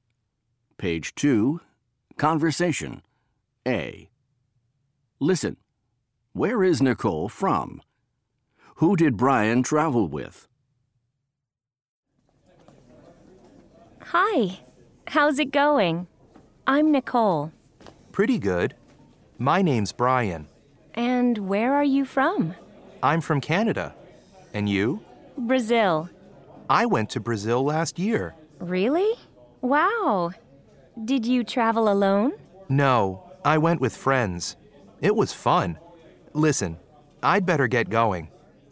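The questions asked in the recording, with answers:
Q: Where is Nicole from?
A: Brazil

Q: Who did Brian travel with?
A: With friends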